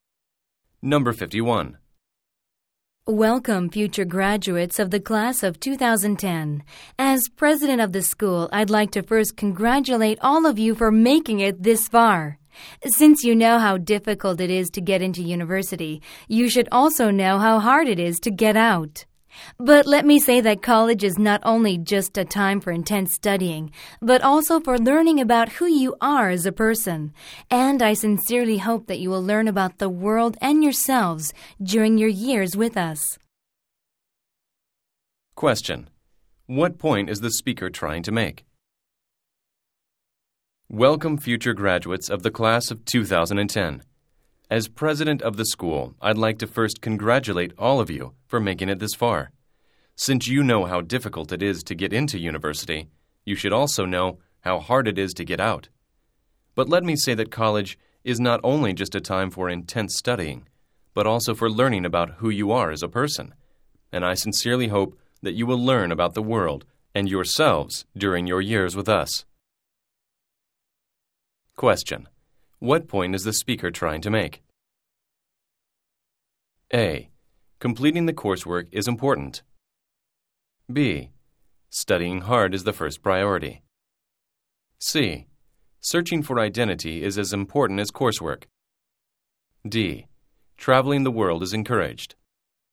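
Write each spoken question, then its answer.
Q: What point is the speaker trying to make?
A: C: Searching for identity is as important as coursework.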